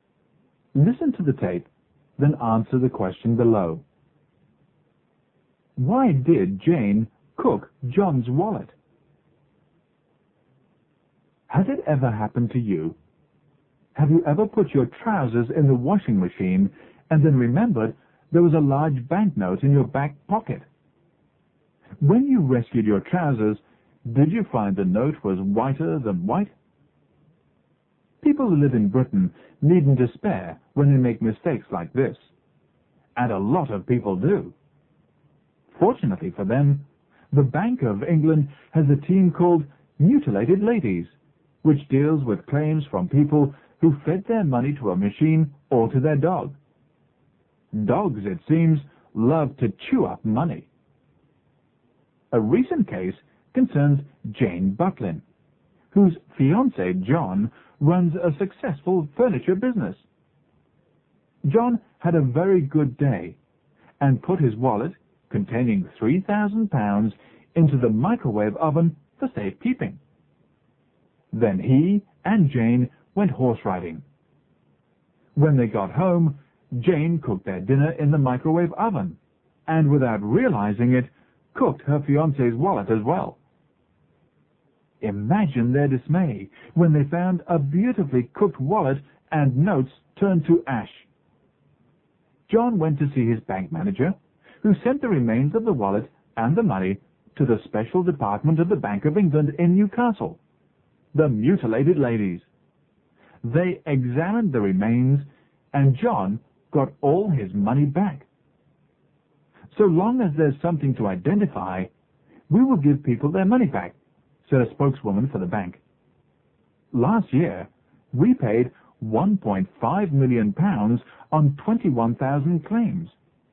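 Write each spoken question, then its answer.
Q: Why did Jane cook John's wallet?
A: She didn't know it was in the microwave oven, where John had put it for safekeeping.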